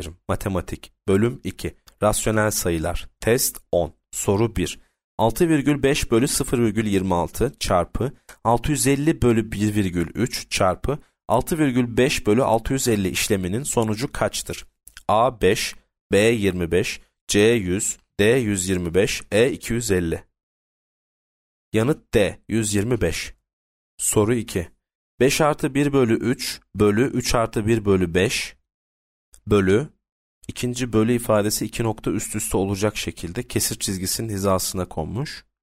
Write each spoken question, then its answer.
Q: 6,5 bölü 0,26 çarpı 650 bölü 1,3 çarpı 6,5 bölü 650 işleminin sonucu kaçtır?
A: Yanıt D 125